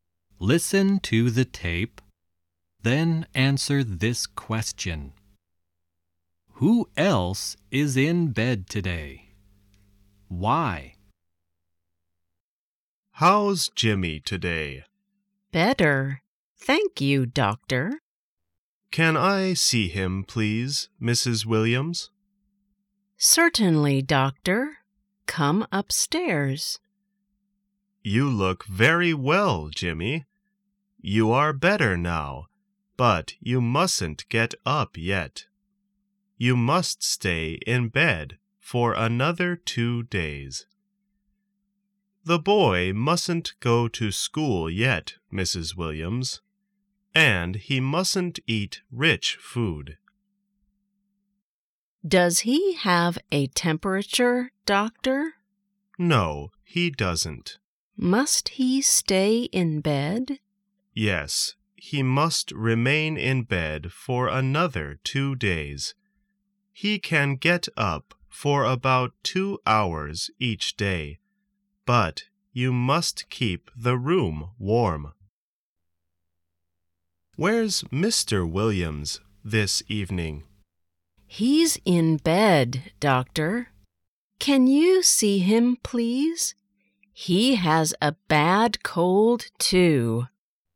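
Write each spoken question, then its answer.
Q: Who else is in bed today?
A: Mr. Williams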